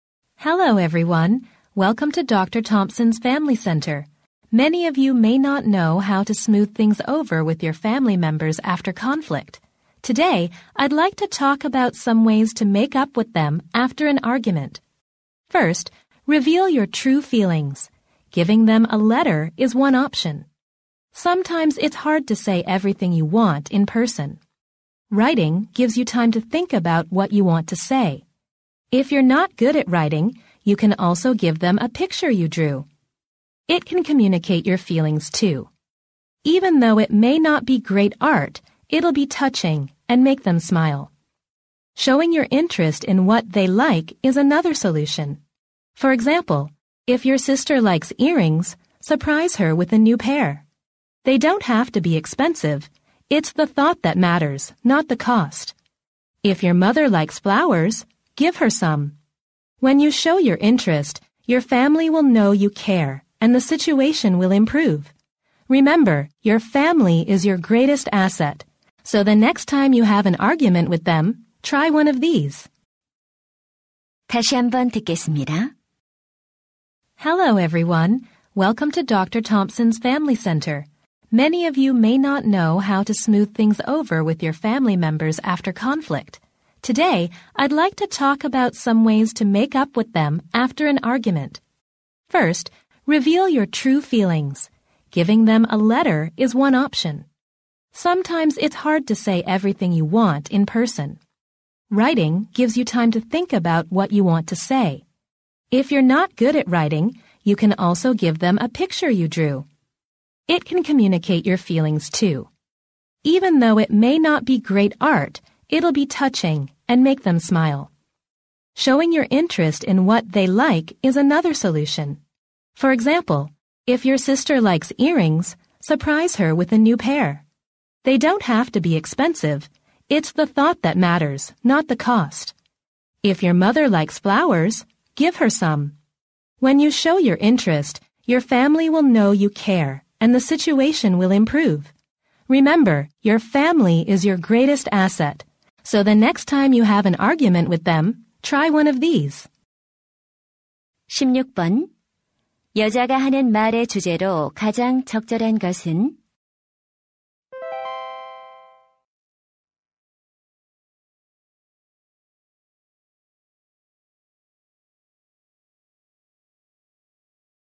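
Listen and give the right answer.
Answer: 말다툼 후 가족과 화해하는 방법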